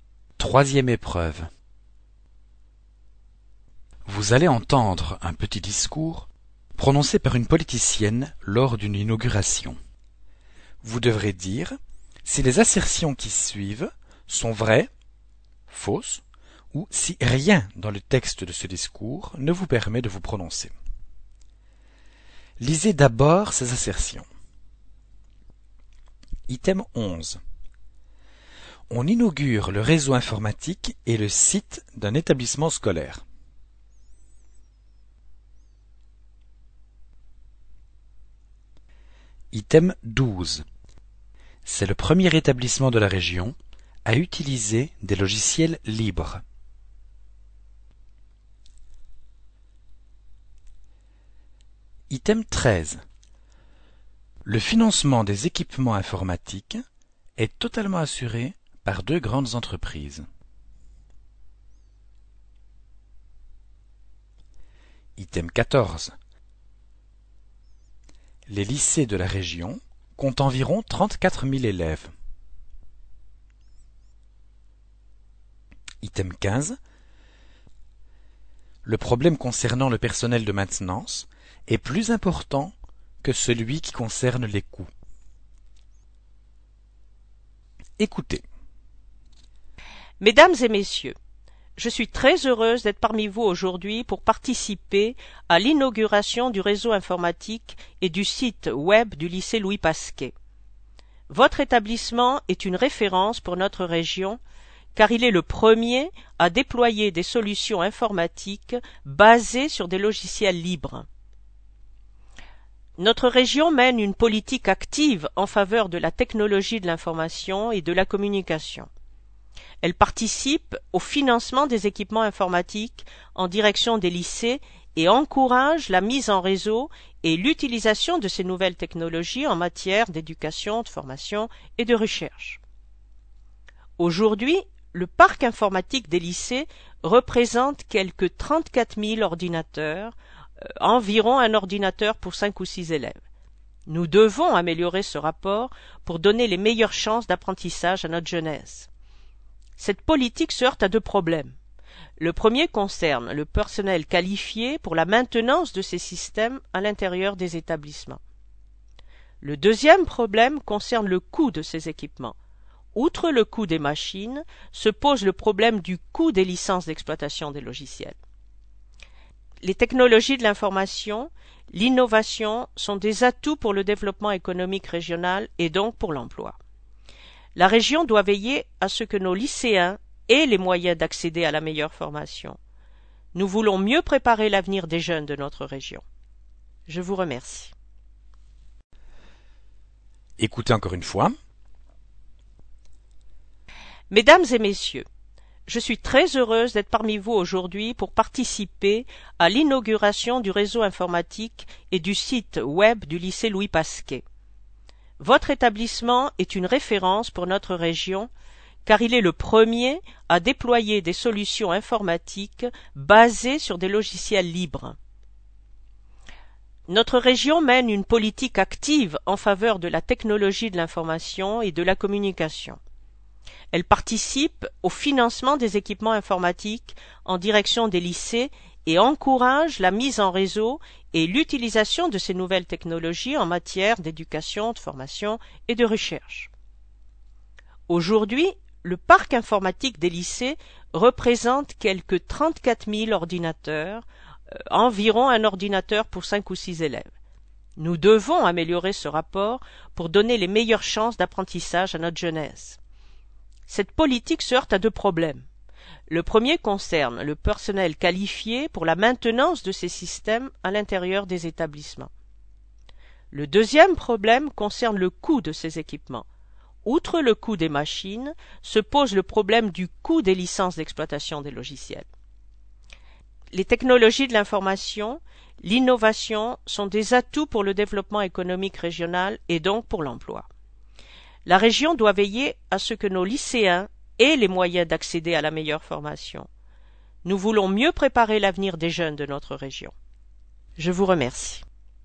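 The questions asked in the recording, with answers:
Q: On inaugure le réseau informatique et le site d'un établissement scolaire.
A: Vrai

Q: C'est le premier établissement de la région à utiliser des logiciels libres.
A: Vrai

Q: Les lycées de la région comptent environ 34 000 élèves.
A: Faux

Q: Le problème concernant le personnel de maintenance est plus important que celui qui concerne les coûts.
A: On ne peut pas se prononcer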